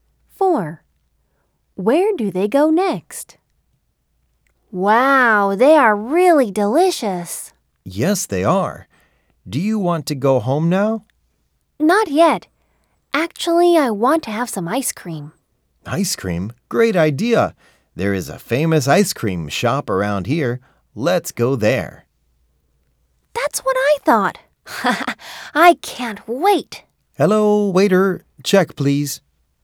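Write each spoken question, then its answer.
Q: Where do they go next?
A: an ice cream shop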